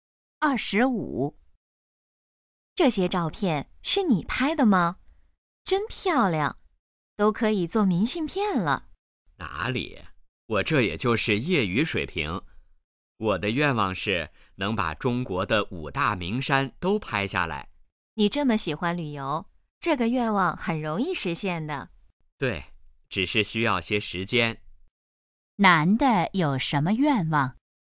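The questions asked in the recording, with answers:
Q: 男的有什么愿望?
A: 把中国的5大名山都拍下来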